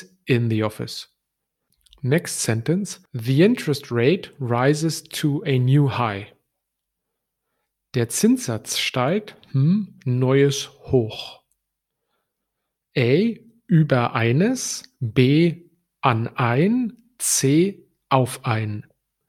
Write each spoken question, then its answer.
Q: Der Zinssatz steigt,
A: And the right answer would be auf ein.